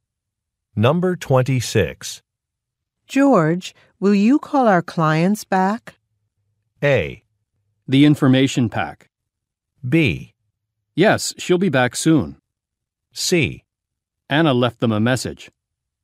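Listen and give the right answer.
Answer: C: Anna left them a message.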